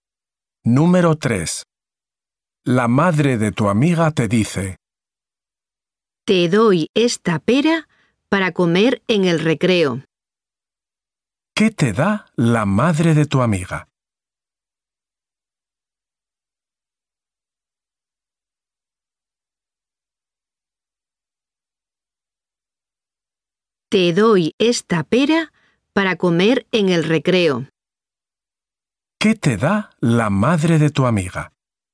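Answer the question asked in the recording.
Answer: Una pera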